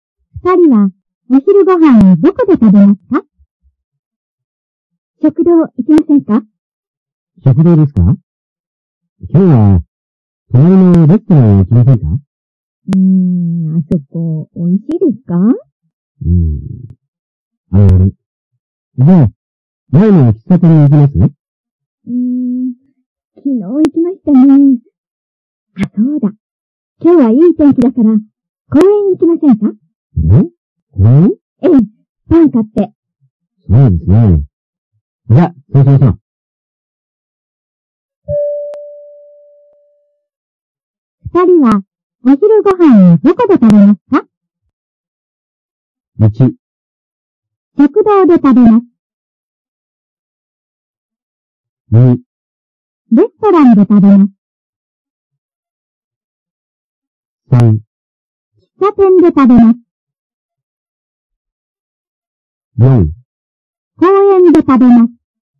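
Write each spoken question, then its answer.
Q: 二人は、お昼ご飯をどこで食べますか?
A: 4: 公園で食べます。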